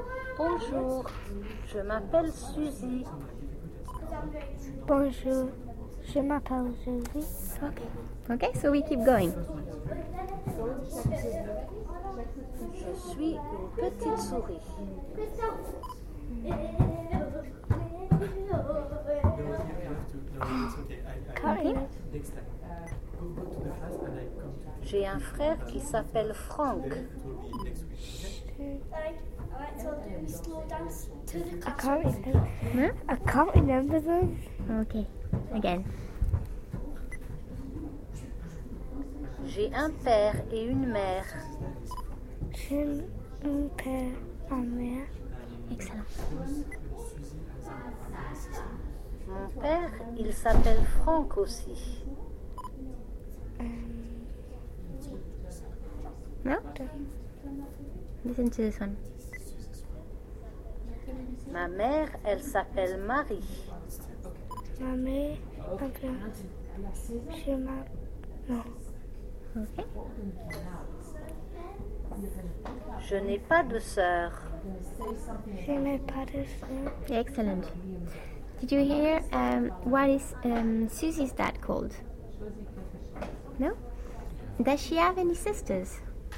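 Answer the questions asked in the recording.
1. Franck
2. No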